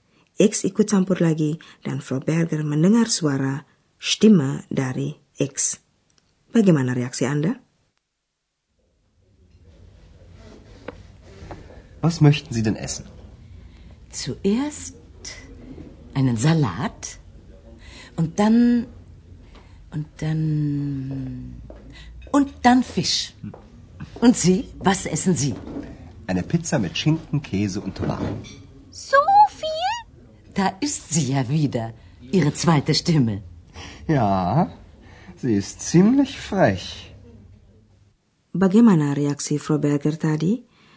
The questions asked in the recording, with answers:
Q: Bagaimana reaksi Frau Berger tadi?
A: Nah, dia menyebut suara X sebagai suara kedua Andreas, jadi dia menerimanya dengan bercanda.